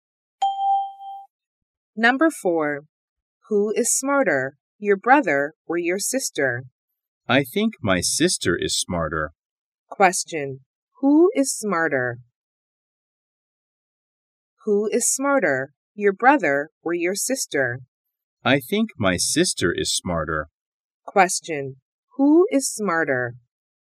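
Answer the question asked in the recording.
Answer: The sister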